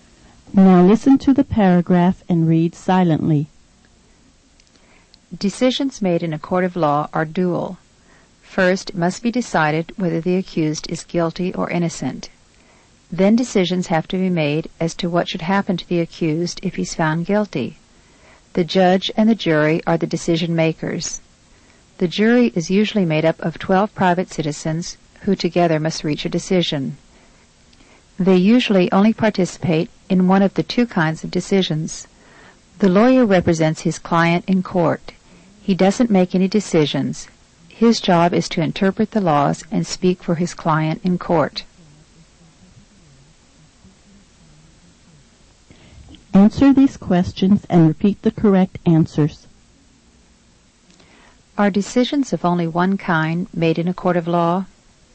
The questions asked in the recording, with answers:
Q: Are decisions of only one kind made in a court of law?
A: No, they're dual.